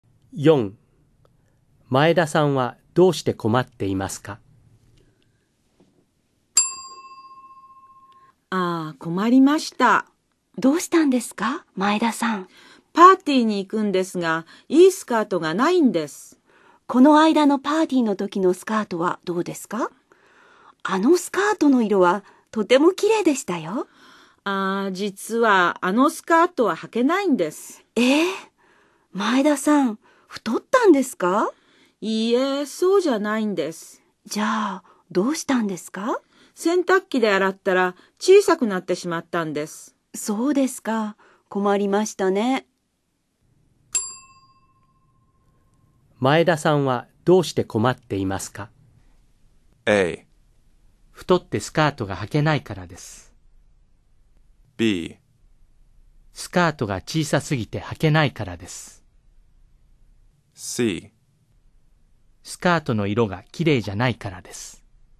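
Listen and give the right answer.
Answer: B: スカートが小さすぎて履けないからです。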